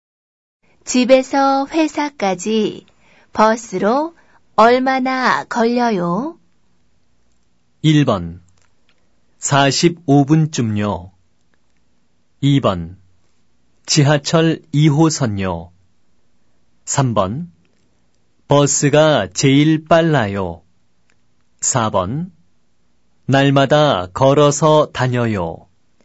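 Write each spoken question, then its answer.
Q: 집에서 회사까지 버스로 얼마나 걸려요?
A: 1: 45분쯤요.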